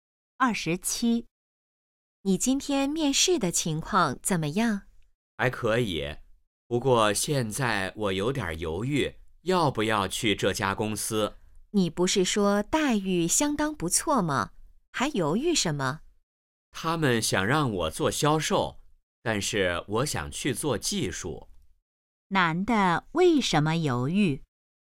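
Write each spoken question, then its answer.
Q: 男的为什么犹豫?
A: 公司想让他做销售,他想做技术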